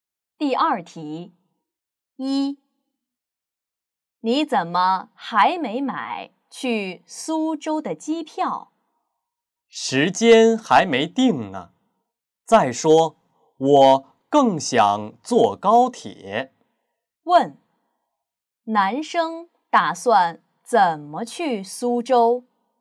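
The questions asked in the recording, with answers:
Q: 男生打算怎么去苏州?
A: 坐高铁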